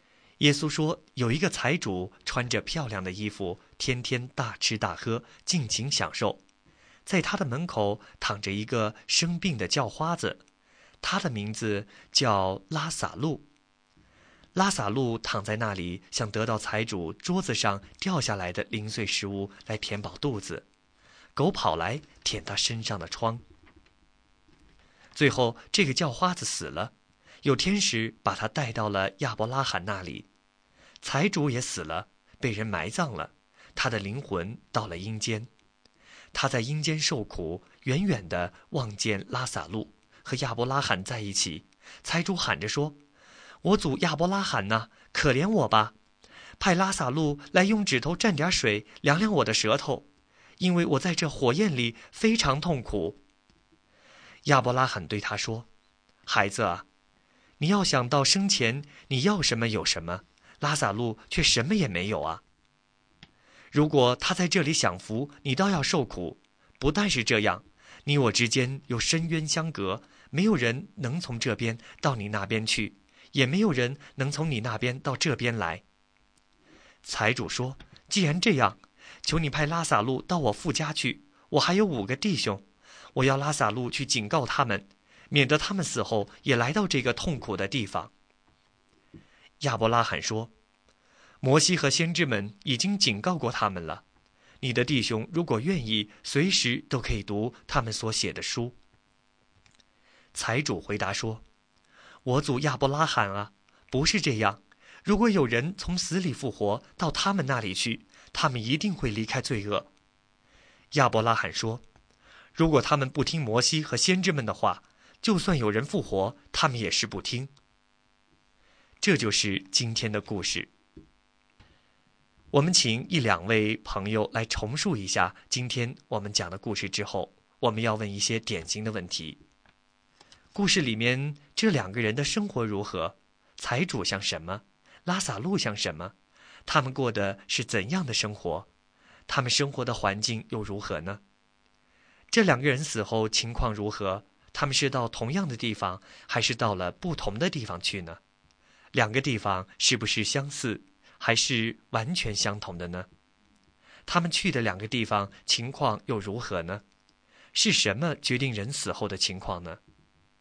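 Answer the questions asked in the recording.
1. 不同的地方:拉撒路被天使带到亚伯拉罕那里,财主到了阴间受苦
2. 拉撒路在亚伯拉罕那里享福,财主在阴间的火焰里受苦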